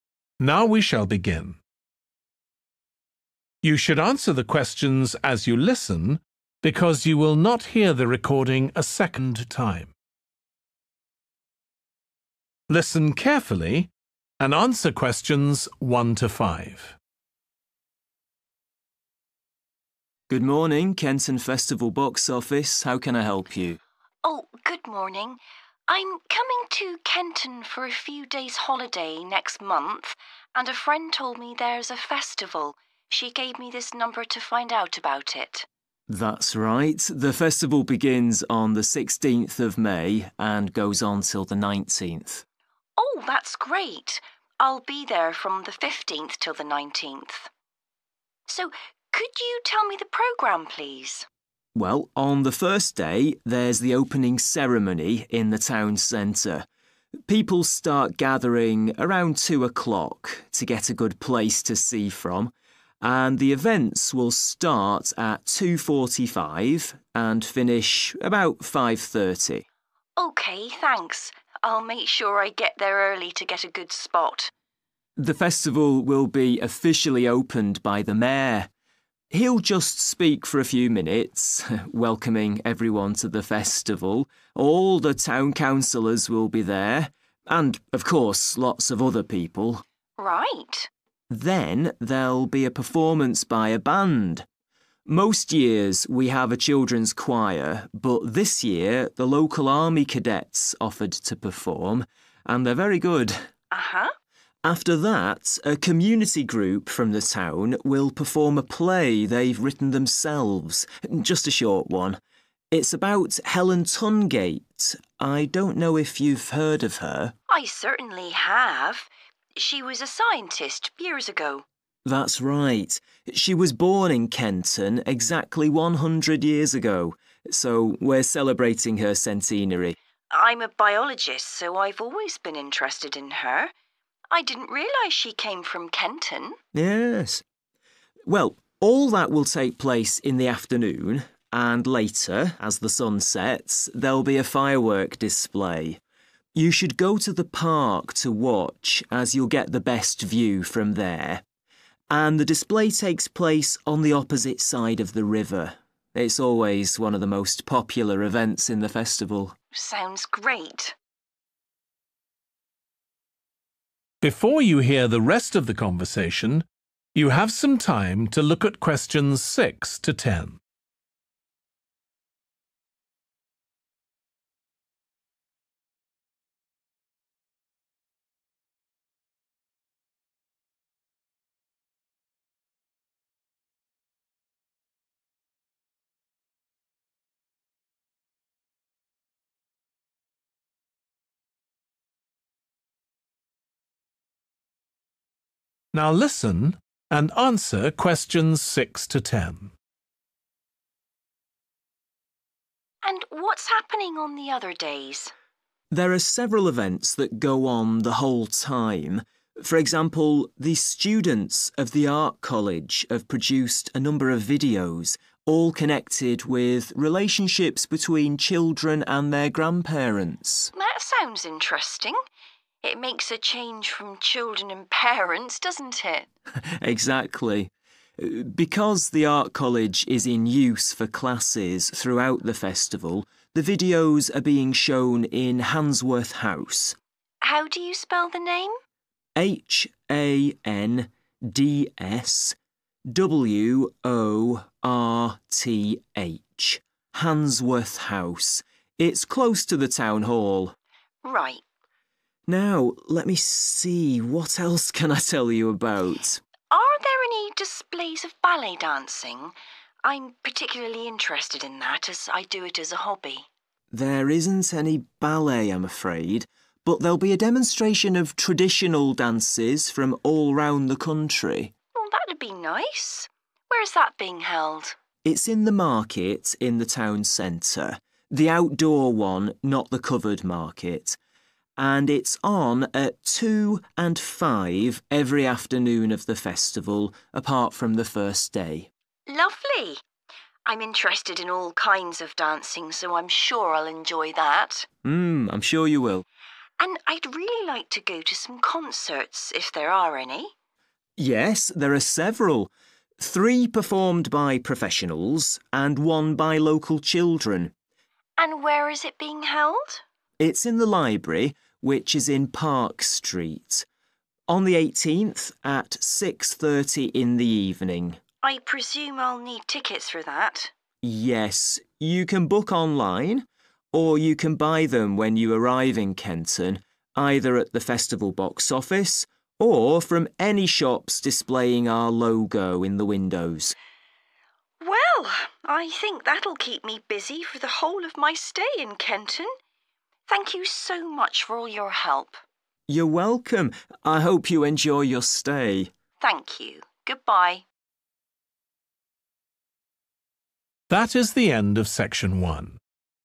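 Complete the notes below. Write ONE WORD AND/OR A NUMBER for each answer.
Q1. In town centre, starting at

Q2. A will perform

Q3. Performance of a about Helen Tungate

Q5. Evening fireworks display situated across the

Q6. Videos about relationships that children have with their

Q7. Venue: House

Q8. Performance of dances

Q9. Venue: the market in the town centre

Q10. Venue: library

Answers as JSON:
{"1": "2.45", "2": "band", "3": "play", "5": "river", "6": "grandparents", "7": "Handsworth", "8": "traditional", "9": "outdoor", "10": "Park"}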